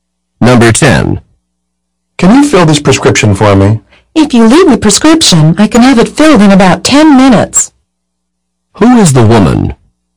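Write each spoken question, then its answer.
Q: Who is the woman?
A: A pharmacist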